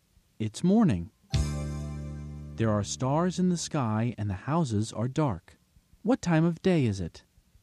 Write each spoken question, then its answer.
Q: What time of day is it?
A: It's night.